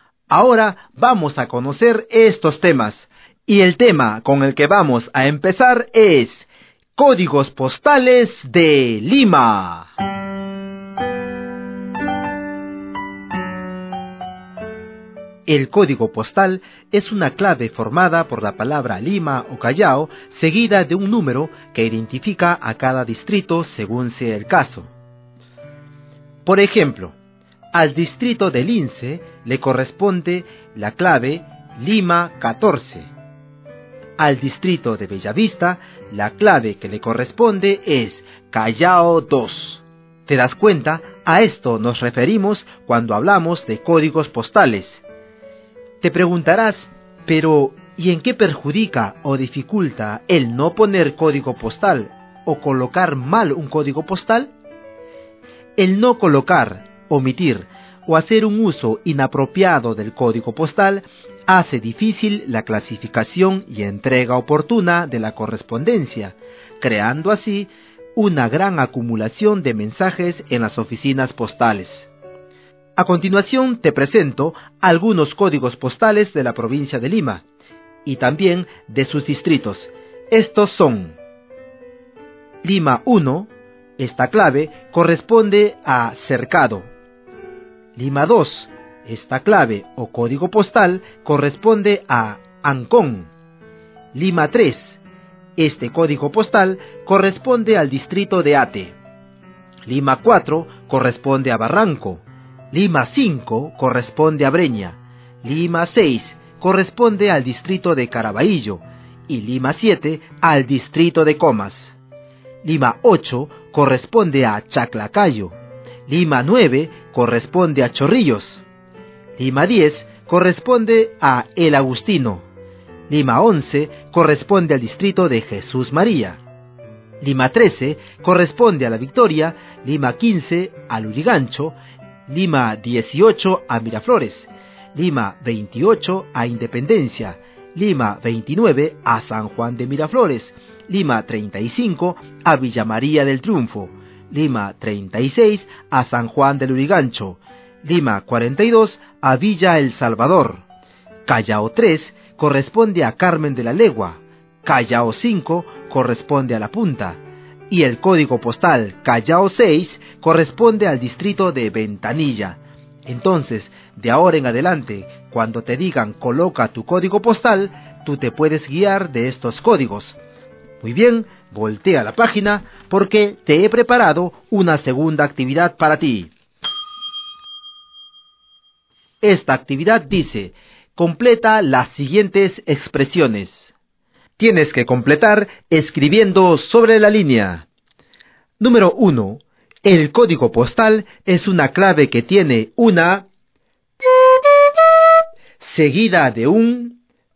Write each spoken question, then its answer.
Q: El código postal es una clave que tiene una seguida de un.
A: El código postal es una clave que tiene una palabra seguida de un número.